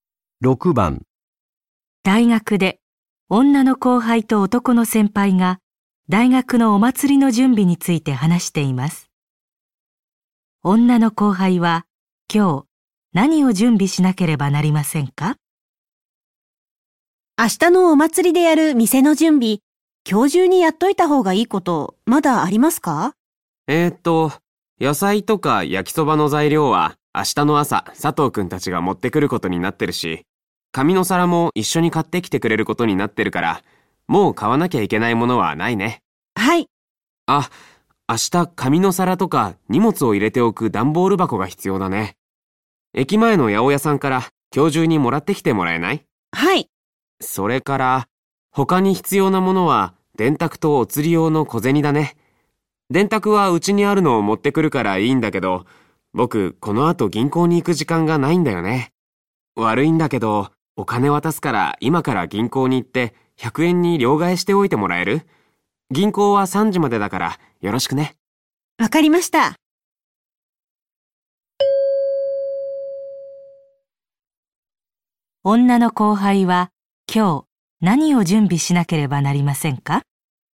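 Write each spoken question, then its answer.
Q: 女の後輩は今日何を準備しなければなりませんか?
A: 八百屋で段ボール箱をもらい、銀行で100円玉に両替する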